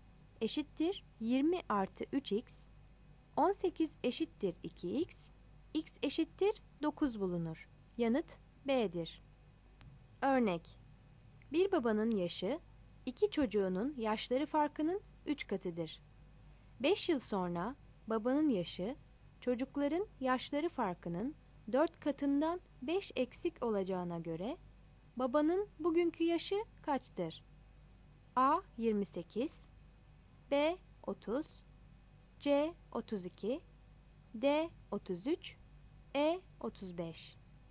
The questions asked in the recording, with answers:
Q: 5 yıl sonra babanın yaşı çocukların yaşları farkının 4 katından 5 eksik olacağına göre Babanın bugünkü yaşı kaçtır?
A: Yanıt B'dir.